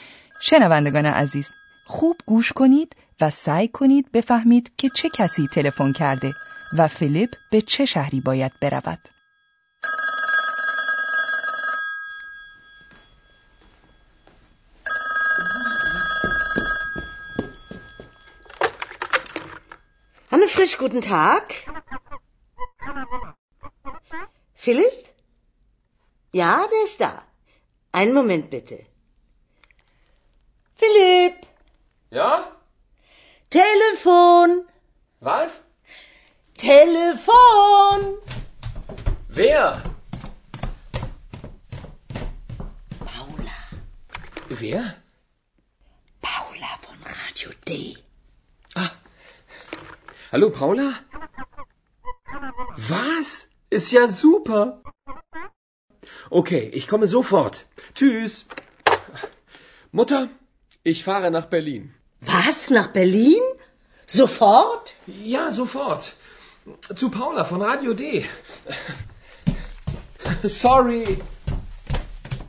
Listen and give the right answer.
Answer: زنی به نام پاولا تلفن کرده است.